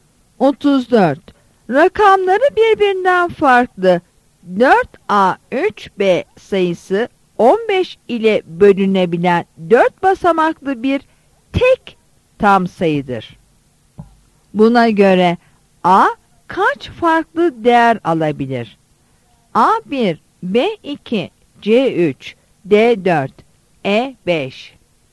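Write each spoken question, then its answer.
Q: Buna göre A kaç farklı değer alabilir?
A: C: 3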